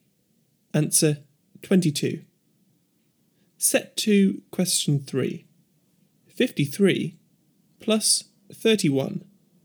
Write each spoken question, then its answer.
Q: 53 plus 31.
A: Answer 84.